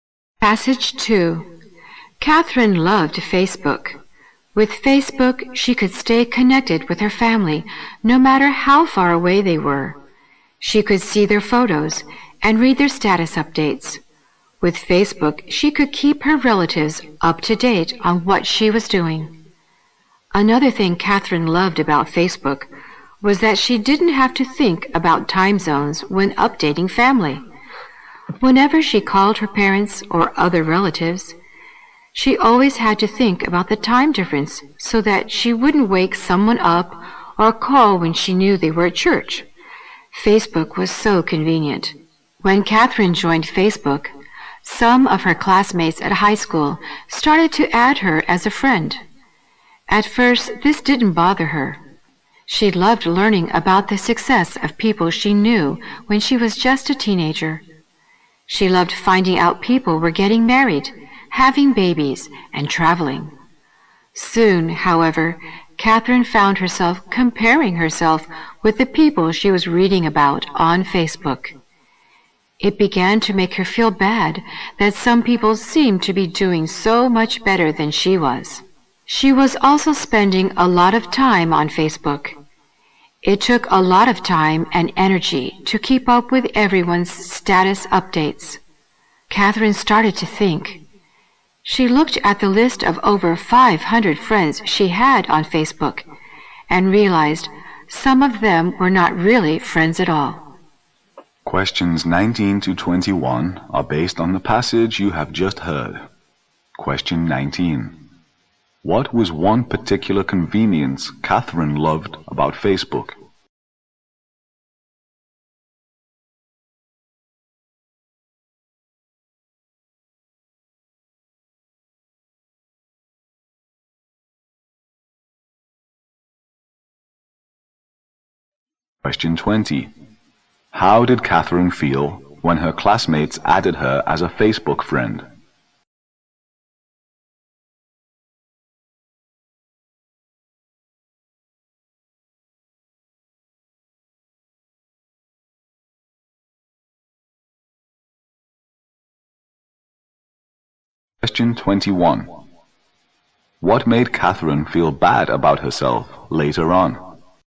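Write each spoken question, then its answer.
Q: What was one particular convenience Catherine loved about Facebook?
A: She didn't have to think about time zones when updating family

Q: How did Catherine feel when her classmates added her as a Facebook friend?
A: It didn't bother her at first; she loved learning of their success

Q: What made Catherine feel bad about herself later on?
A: Comparing herself with people who seemed to be doing better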